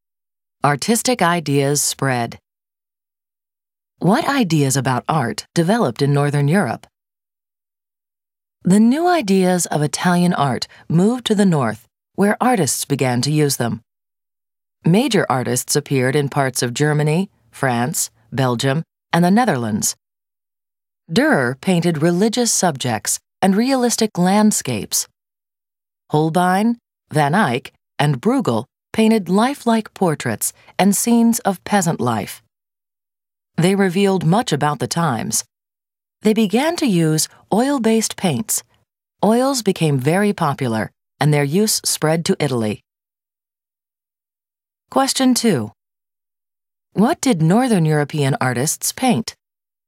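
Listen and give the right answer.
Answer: Religious subjects, realistic landscapes, lifelike portraits and scenes of peasant life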